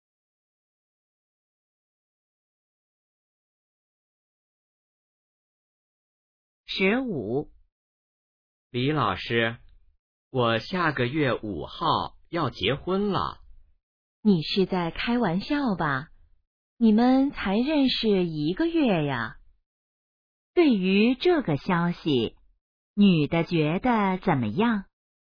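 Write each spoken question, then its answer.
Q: 女的觉得怎么样?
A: 不相信,很吃惊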